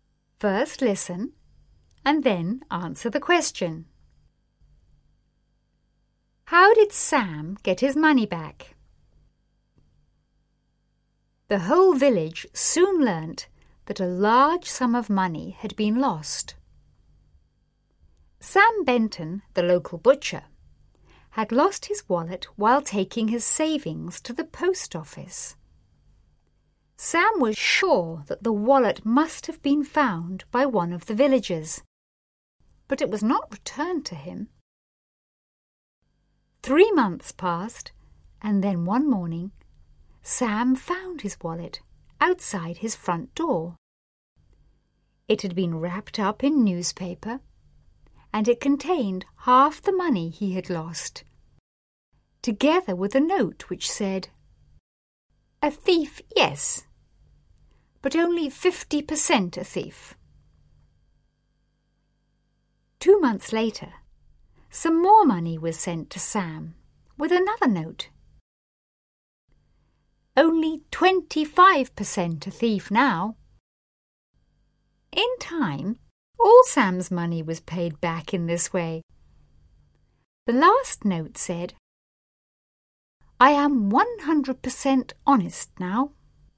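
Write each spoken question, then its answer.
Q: How did Sam get his money back?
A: The thief returned it in instalments, left with notes (half first, then more later, until all was paid back).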